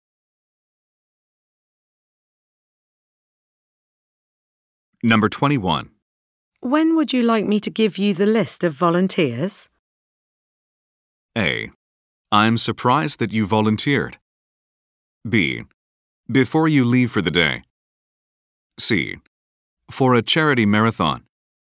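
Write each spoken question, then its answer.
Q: When would you like me to give you the list of volunteers?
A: B: Before you leave for the day.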